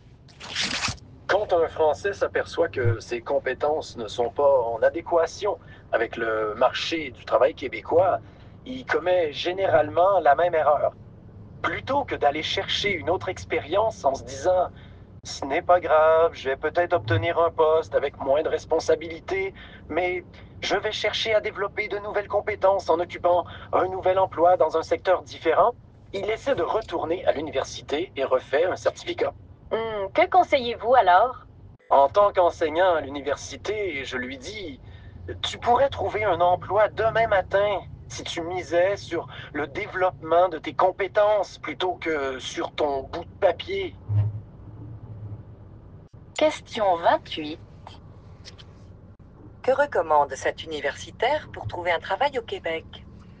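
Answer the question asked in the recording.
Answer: Miser sur le développement de ses compétences plutôt que sur les diplômes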